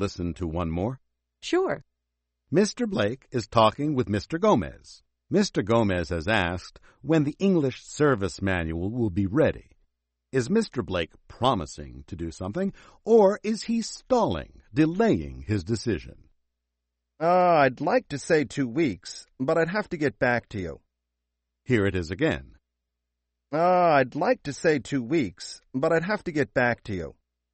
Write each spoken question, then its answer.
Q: Is Mr. Blake promising to do something, or is he stalling, delaying his decision?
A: Right again. He's stalling.